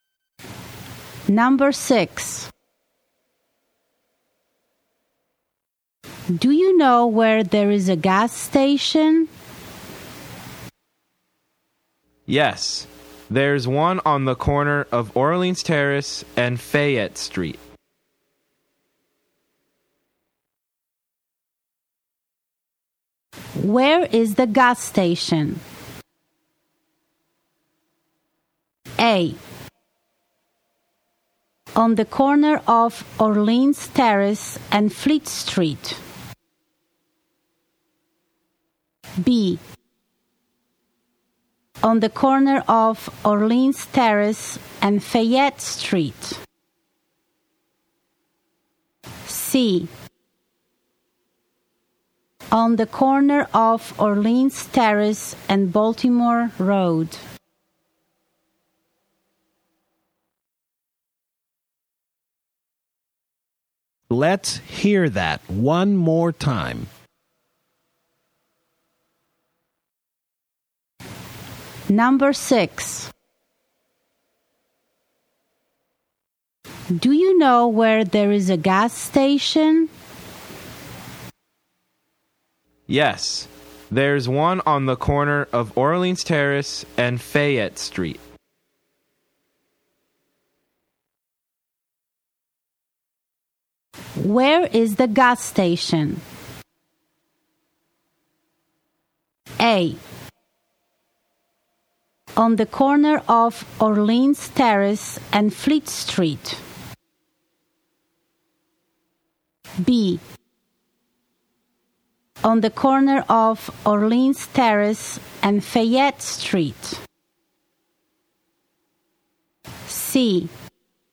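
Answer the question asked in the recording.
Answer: B: On the corner of Orleans Terrace and Fayette Street.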